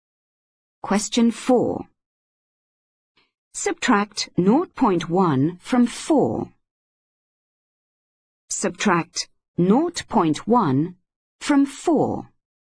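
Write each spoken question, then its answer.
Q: Subtract 0.1 from 4.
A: 3.9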